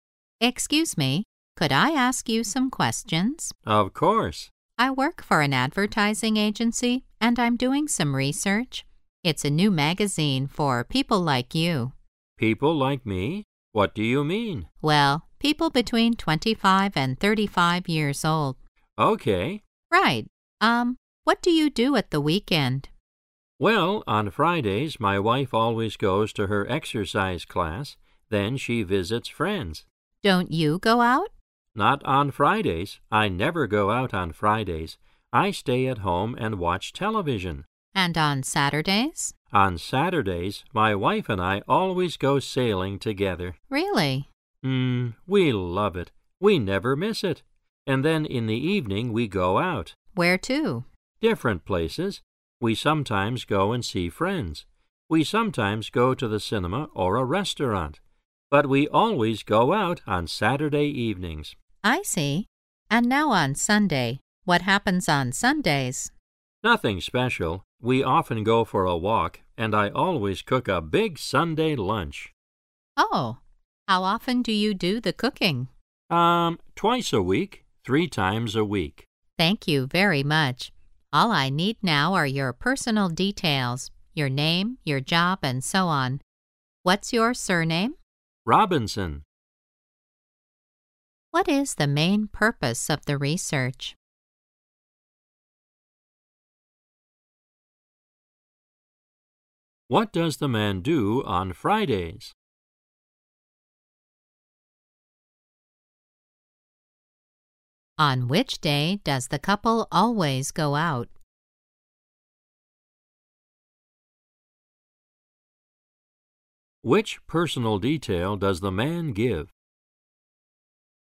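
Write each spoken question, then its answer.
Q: What does the man do on Fridays?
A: He stays at home and watches television

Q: On which day does the couple always go out?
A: Saturday (evenings)

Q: Which personal detail does the man give?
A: His surname, Robinson

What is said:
[听力原文] W: Excuse me, could I ask you some questions? M: Of course. W: I work for an advertising agency, and I'm doing some research. It's a new magazine for people like you. M: People like me? What do you mean? W: Well, people between 25 and 35 years old. W: Right. Era, what do you do at the weekend? M: Well, on Fridays my wife always goes to her exercise class. Then she visits friends. W: Don't you go out? M: Not on Fridays. I never go out on Fridays. I stay at home and watch television. W: And on Saturdays? M: On Saturdays, my wife and I always go sailing together. W: Really? M: Era, we love it. We never miss it. 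And then in the evening we go out. W: Where to? M: Different places. We sometimes go and see friends. We sometimes go to the cinema or a restaurant. But we always go out on Saturday evenings. W: I see. And now on Sunday, what happens on Sundays? M: Nothing special. We often go for a walk, and I always cook a big Sunday lunch. W: Oh! How often do you do the cooking? M: Em, twice a week, three times a week. W: Thank you very much. All I need now are your personal details: your name, your job, and so on. What's your surname? M: Robinson.
What is the main purpose of the research?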